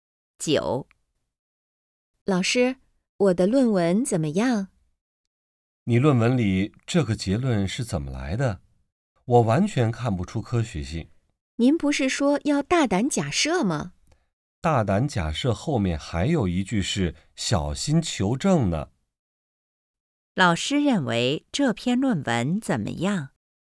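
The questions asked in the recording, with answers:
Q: 老师认为这篇论文怎么样?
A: 结论缺乏科学性,没有小心求证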